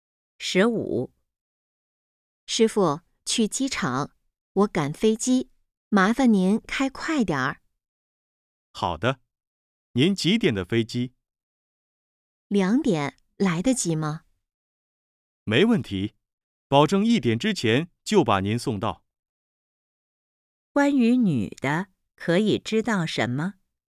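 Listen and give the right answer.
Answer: 她要去机场赶2点的飞机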